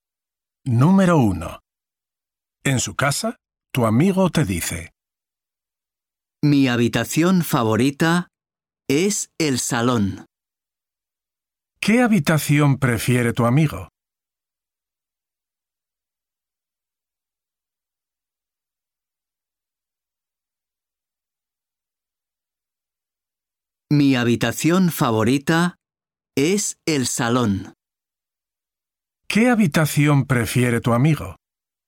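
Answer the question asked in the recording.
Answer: el salón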